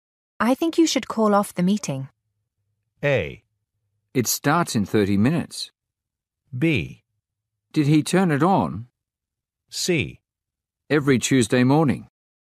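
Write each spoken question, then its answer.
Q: I think you should call off the meeting.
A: A: It starts in 30 minutes.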